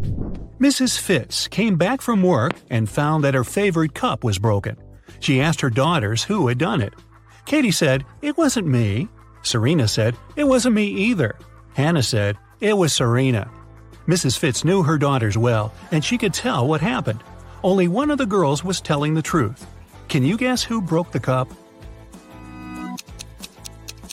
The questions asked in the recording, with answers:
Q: Can you guess who broke the cup?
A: So Serena is the honest girl, and Katie is the guilty one.